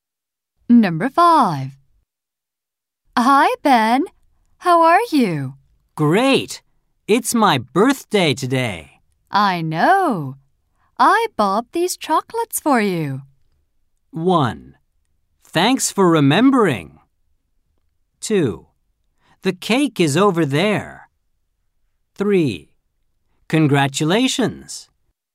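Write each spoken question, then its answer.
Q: I know. I bought these chocolates for you.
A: 1: Thanks for remembering.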